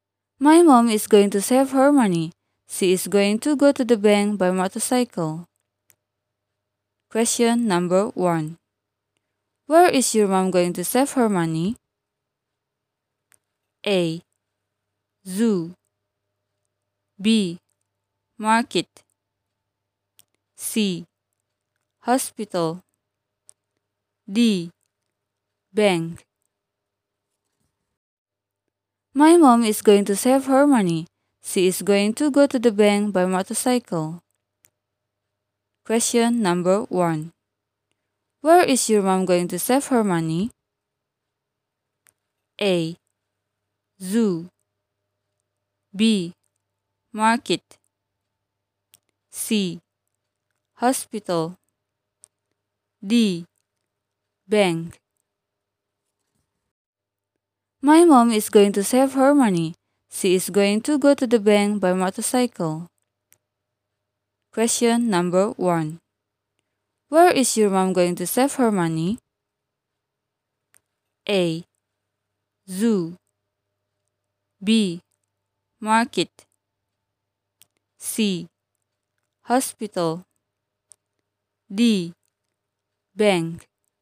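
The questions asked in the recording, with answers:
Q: Where is your mom going to save her money?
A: D: bank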